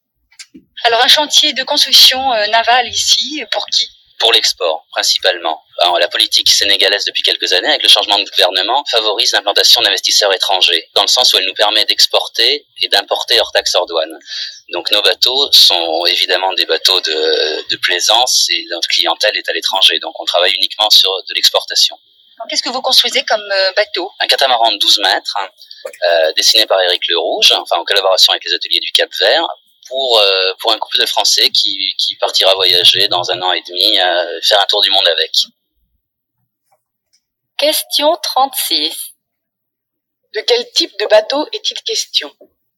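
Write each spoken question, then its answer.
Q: De quel type de bateau est-il question ?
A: Un catamaran de 12 mètres (bateau de plaisance)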